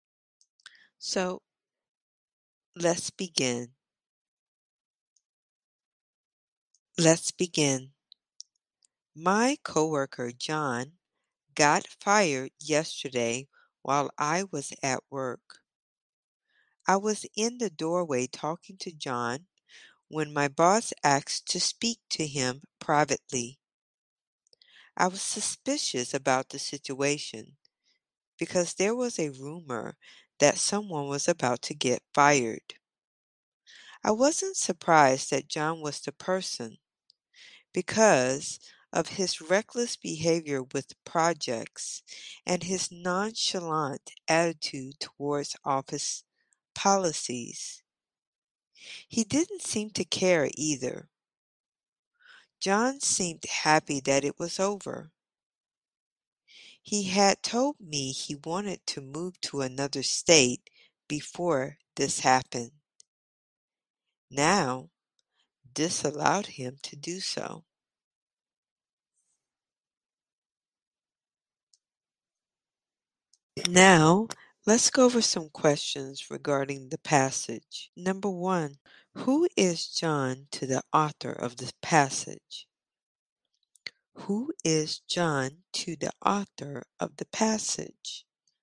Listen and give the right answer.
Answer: John is his coworker.